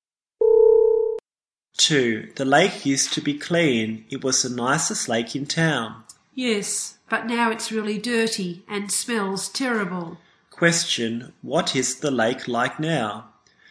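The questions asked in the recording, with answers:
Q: Question, what is the lake like now?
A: Really dirty and smells terrible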